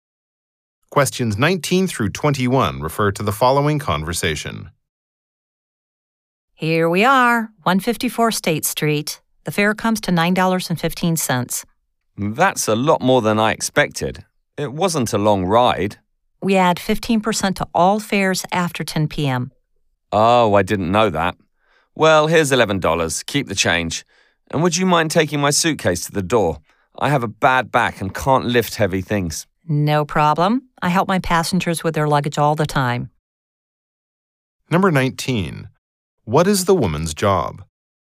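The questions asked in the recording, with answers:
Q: What is the woman's job?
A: Taxi driver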